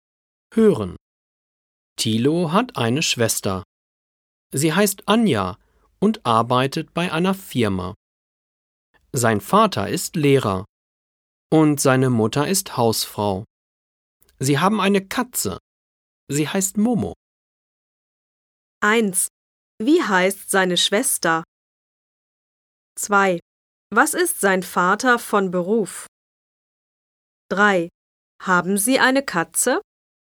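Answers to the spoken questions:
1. Anja
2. Lehrer
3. Ja, sie heißt Momo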